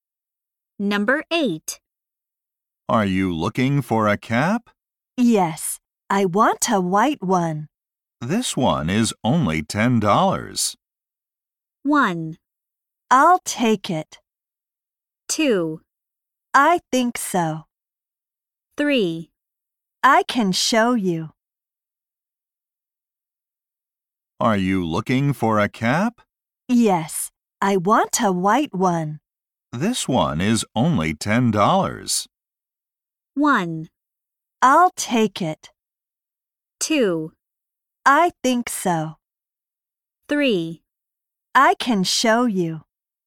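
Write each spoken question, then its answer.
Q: This one is only $10.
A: 1: I'll take it.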